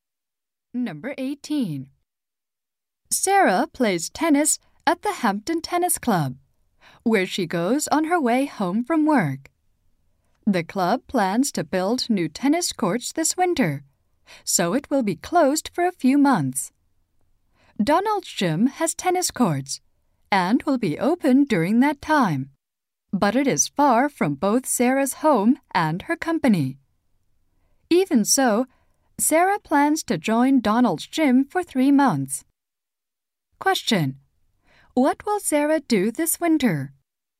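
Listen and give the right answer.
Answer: Join Donald's gym for 3 months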